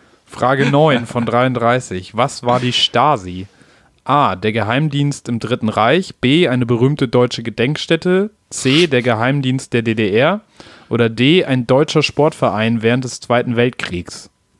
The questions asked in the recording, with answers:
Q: Was war die Stasi?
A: Geheimdienst in der DDR.